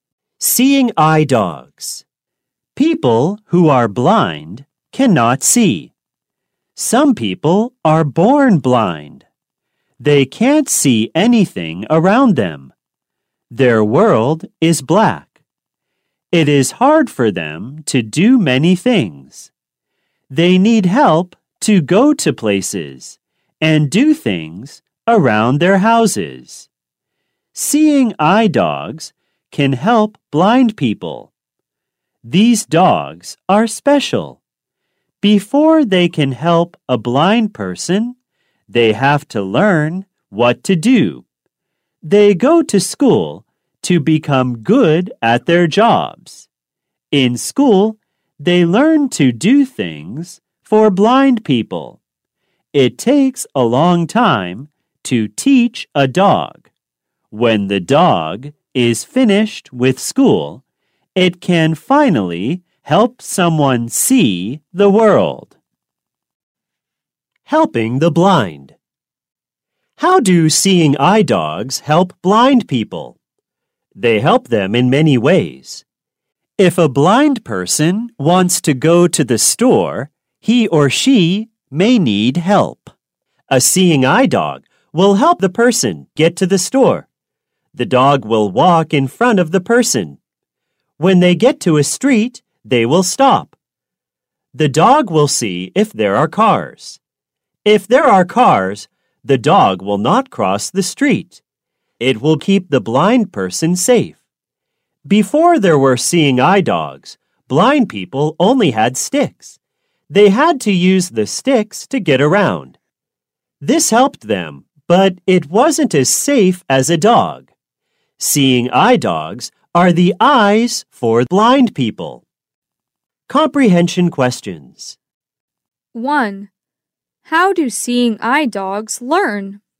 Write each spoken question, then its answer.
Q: How do seeing eye dogs learn?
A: They go to school like people.